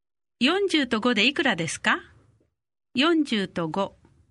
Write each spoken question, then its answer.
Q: 40と5でいくらですか40と5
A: 45 40と5で45